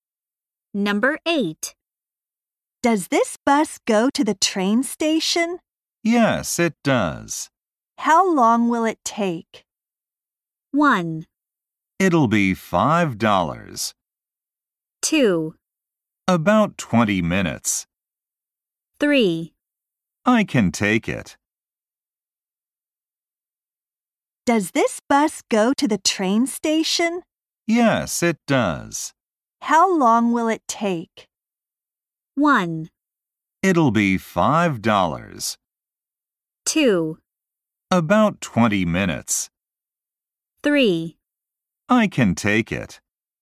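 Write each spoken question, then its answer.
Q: How long will it take?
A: 2: About 20 minutes.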